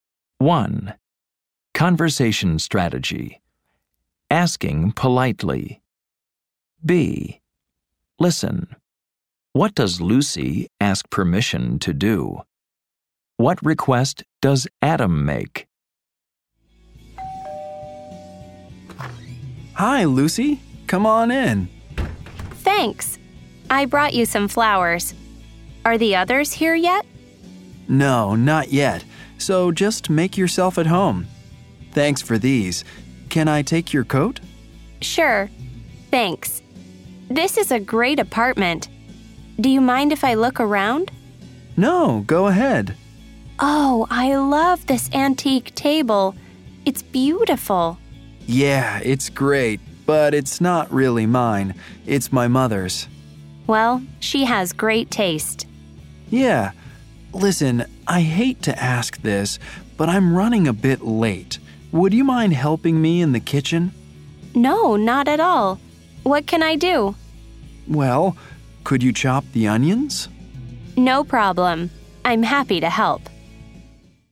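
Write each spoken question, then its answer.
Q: What does Lucy ask permission to do?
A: To look around Adam's apartment

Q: What request does Adam make?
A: He asks her to help him in the kitchen by chopping the onions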